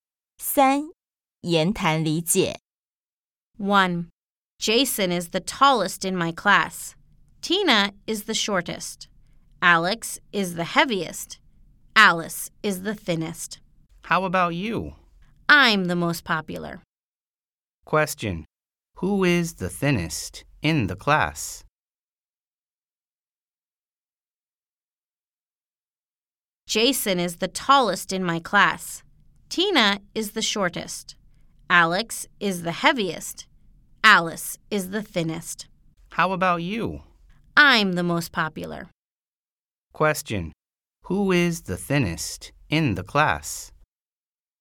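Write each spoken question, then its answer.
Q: Who is the thinnest in the class?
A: Alice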